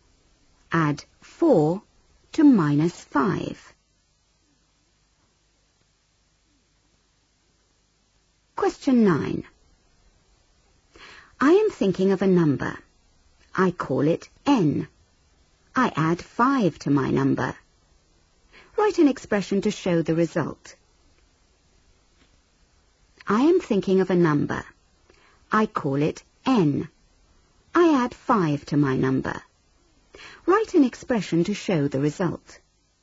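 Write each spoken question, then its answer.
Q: Write an expression to show the result.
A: n + 5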